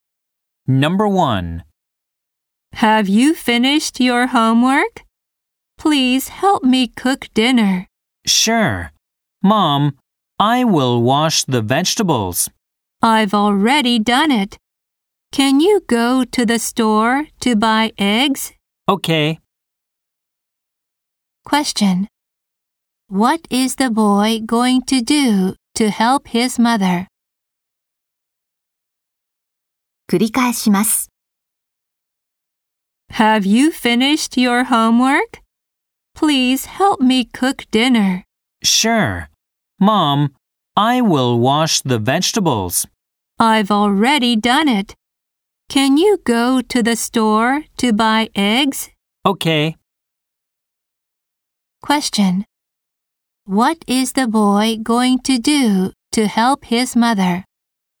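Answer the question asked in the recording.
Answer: Go to the store to buy eggs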